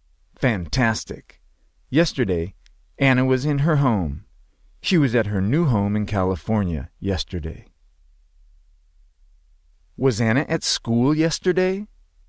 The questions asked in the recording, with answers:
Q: Was Anna at school yesterday?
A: No.